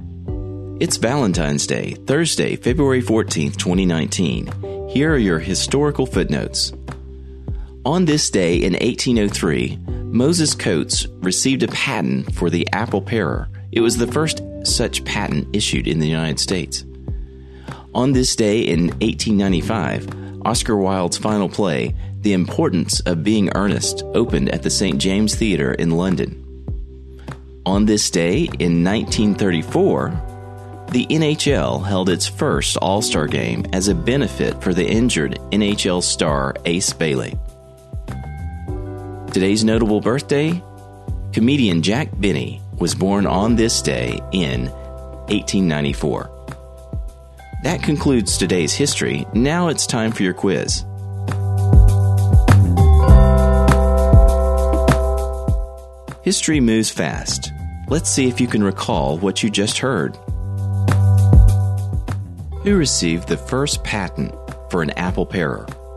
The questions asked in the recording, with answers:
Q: Who received the first patent for an apple parer?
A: The answer is Moses Coates.